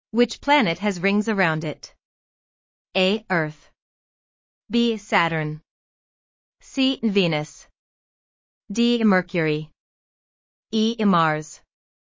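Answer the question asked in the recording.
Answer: B: Saturn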